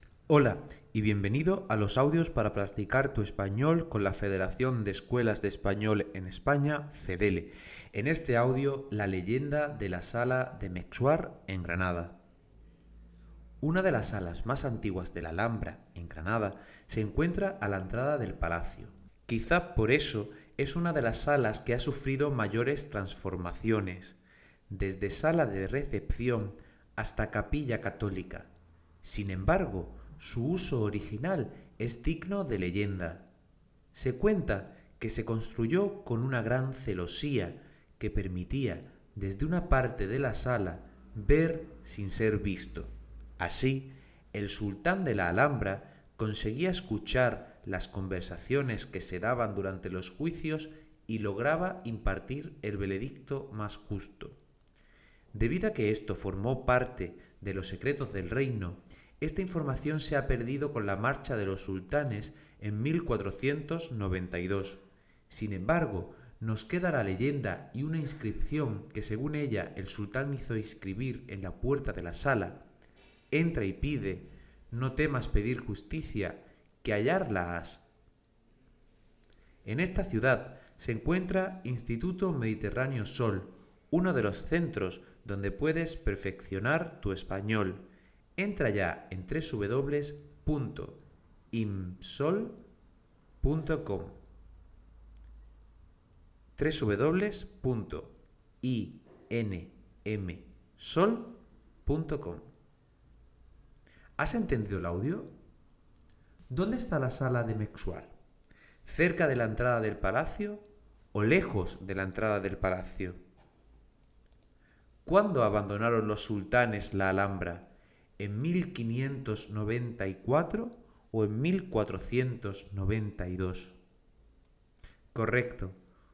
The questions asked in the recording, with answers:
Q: ¿Dónde está la sala de Mexuar? ¿Cerca de la entrada del palacio o lejos de la entrada del palacio?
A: la sala de Mexuar se encuentra cerca de la entrada del palacio

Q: ¿Cuándo abandonaron los sultanes la Alhambra?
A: Abandonaron la Alhambra en 1492